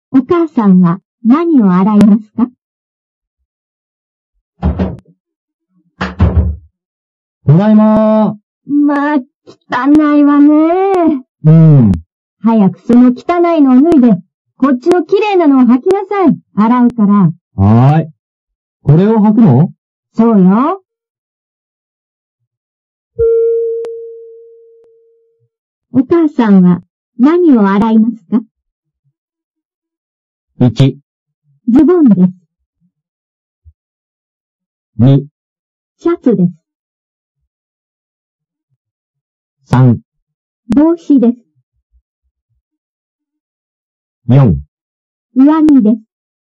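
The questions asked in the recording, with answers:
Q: お母さんは何を洗いますか?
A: 1: ズボンです。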